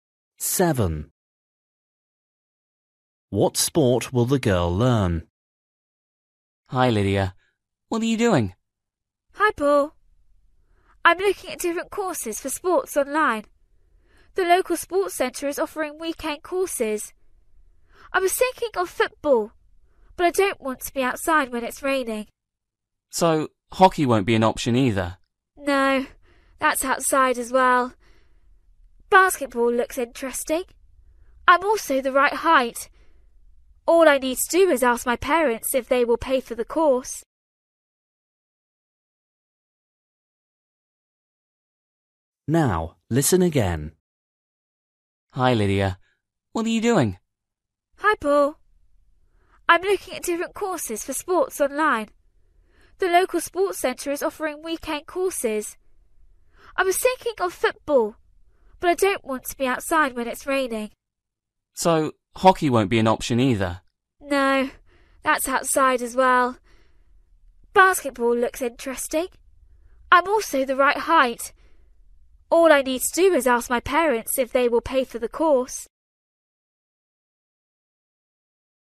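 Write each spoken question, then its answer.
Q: What sport will the girl learn?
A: basketball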